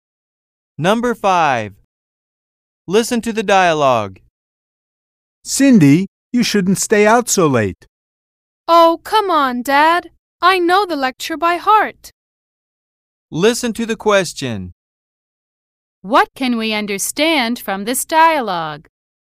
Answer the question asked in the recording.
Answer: Cindy knows what her father is going to say.